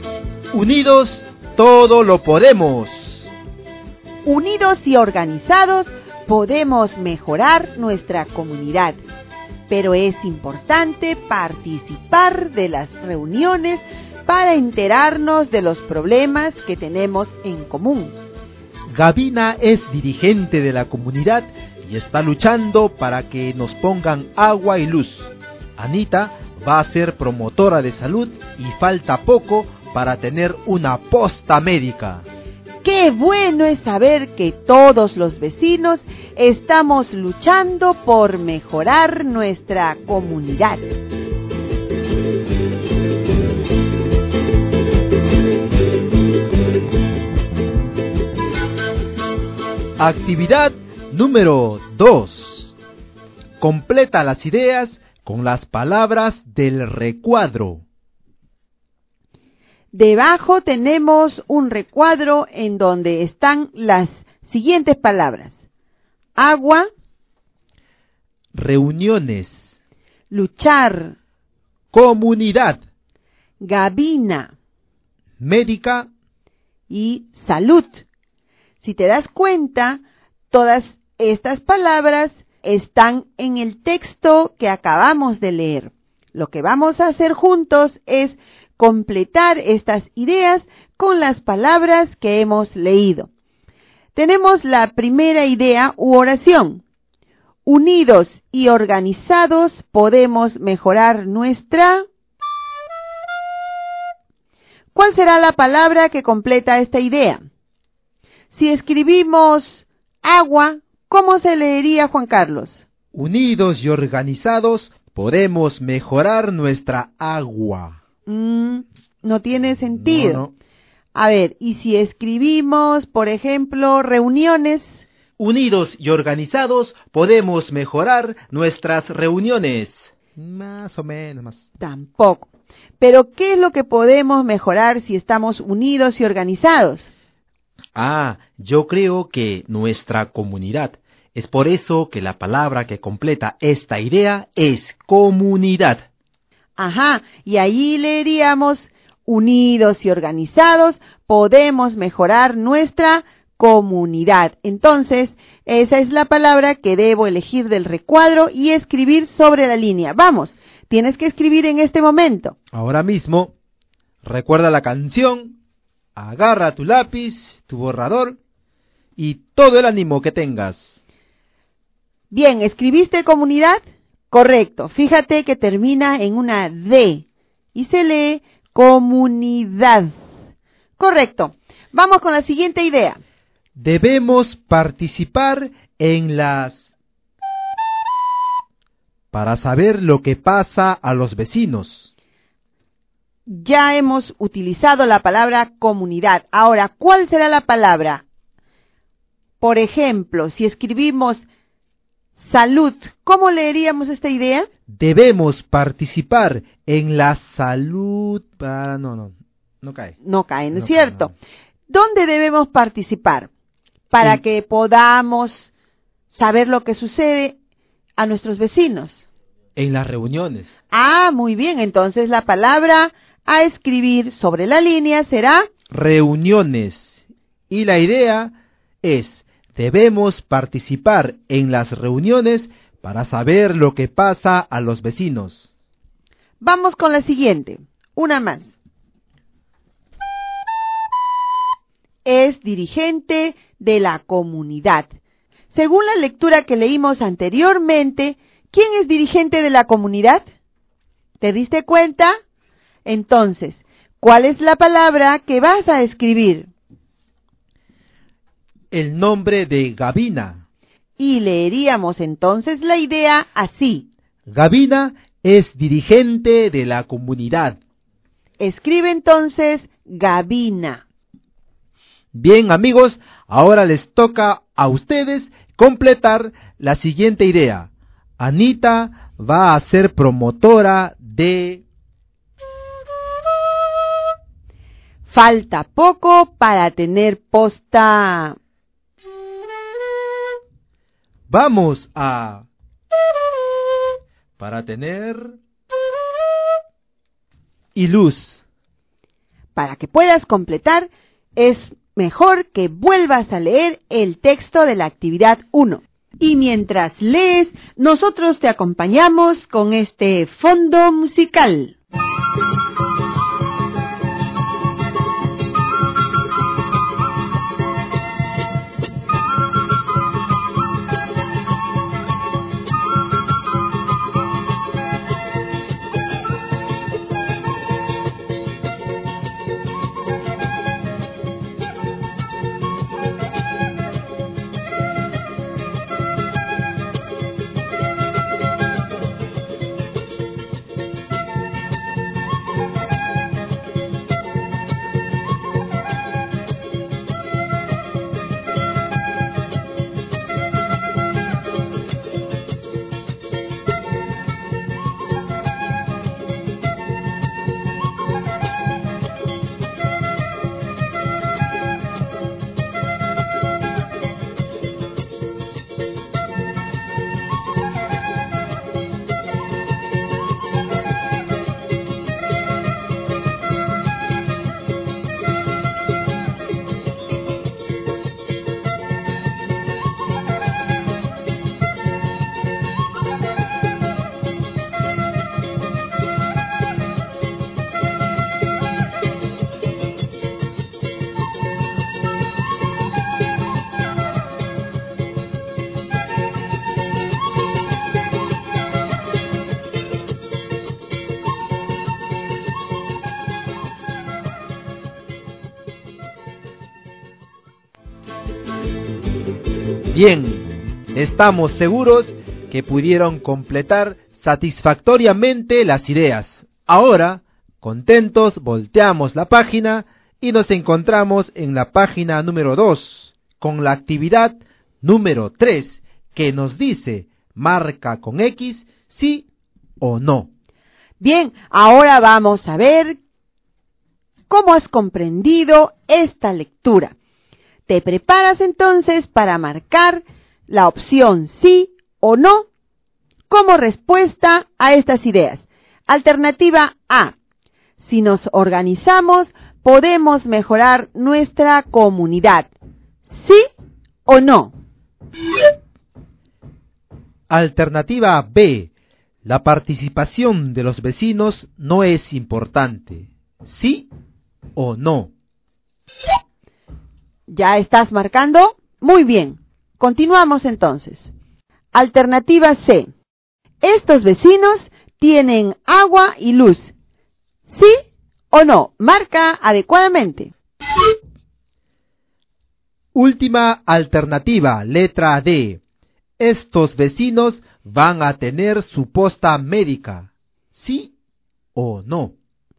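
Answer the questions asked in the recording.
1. Sí
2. No
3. No
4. Sí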